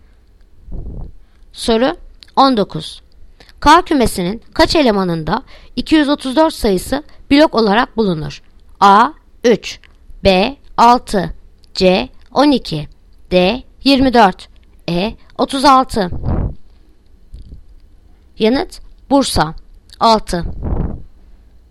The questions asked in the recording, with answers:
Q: K kümesinin kaç elemanında 234 sayısı blok olarak bulunur?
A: Yanıt Bursa 6